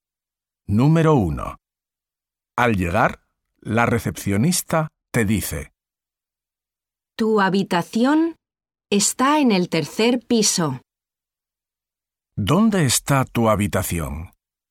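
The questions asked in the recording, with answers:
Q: ¿Dónde está tu habitación?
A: En el tercer piso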